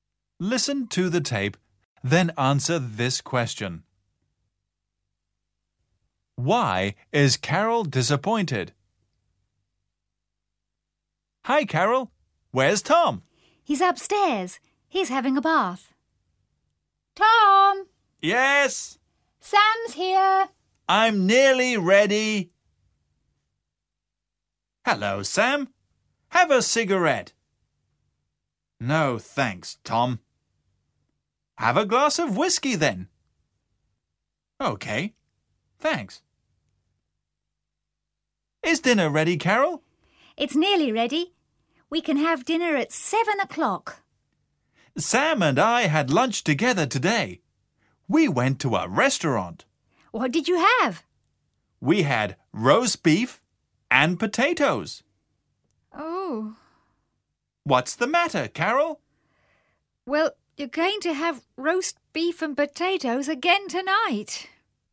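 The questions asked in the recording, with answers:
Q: Why is Carol disappointed?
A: Because Tom and Sam already had roast beef and potatoes for lunch, and she is serving the same for dinner.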